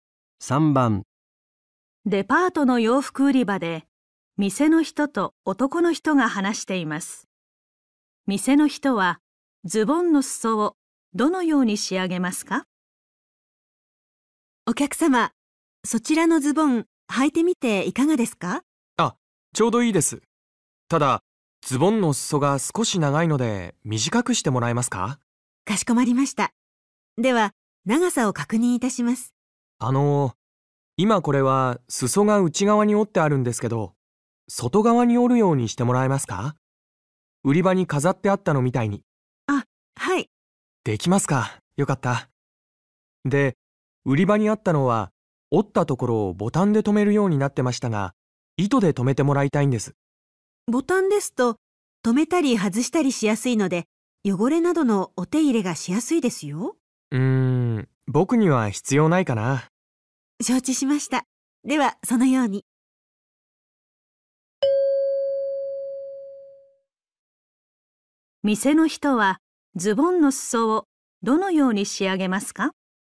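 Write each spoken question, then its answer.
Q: 店の人はズボンの裾をどのように仕上げますか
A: 外側に折って糸で留める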